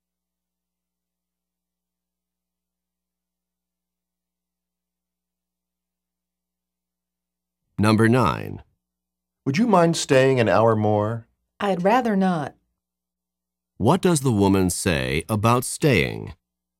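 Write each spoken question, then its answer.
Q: What does the woman say about staying?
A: She would prefer not to stay.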